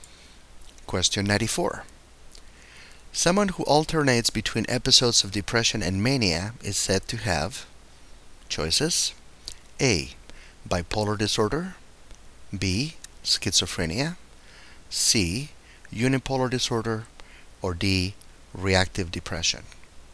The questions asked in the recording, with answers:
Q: Someone who alternates between episodes of depression and mania is said to have,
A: The correct choice here is A, bipolar disorder.